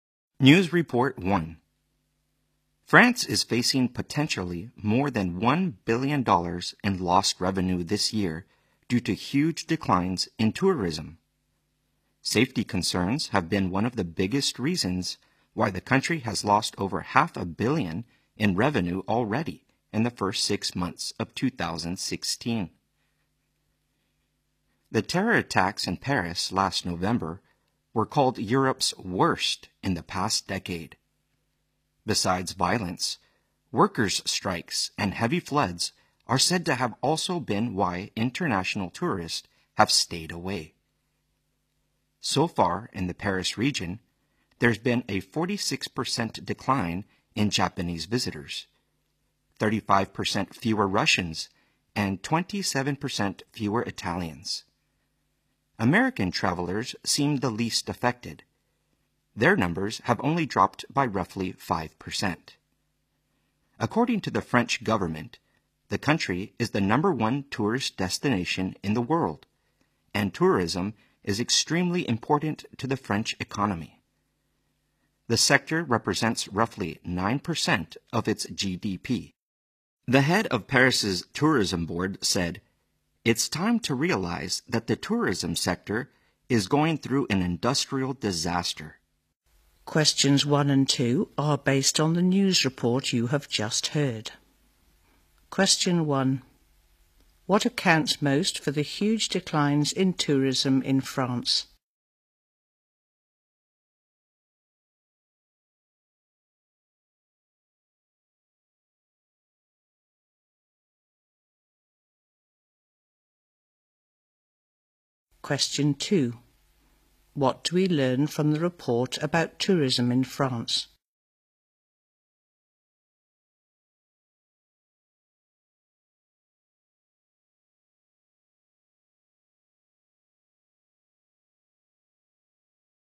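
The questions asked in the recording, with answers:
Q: What accounts most for the huge declines in tourism in France?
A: Safety concerns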